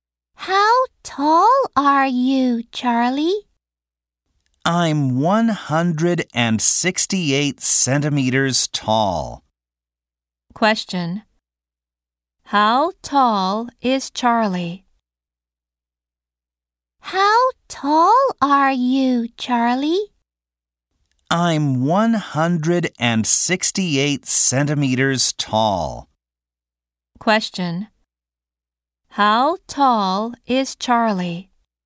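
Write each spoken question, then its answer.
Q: How tall is Charlie?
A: 168 centimeters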